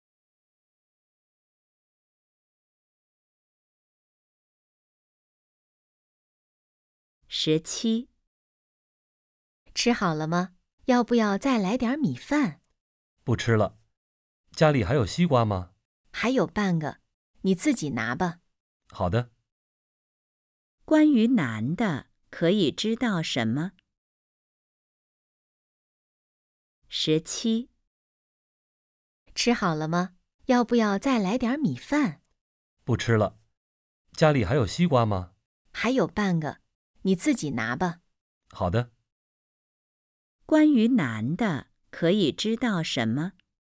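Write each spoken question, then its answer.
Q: 关于男的,可以知道什么?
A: 想吃西瓜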